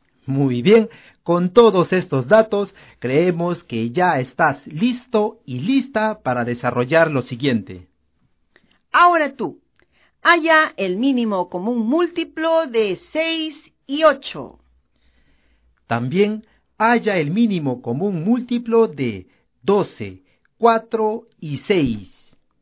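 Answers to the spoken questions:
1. 24
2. 12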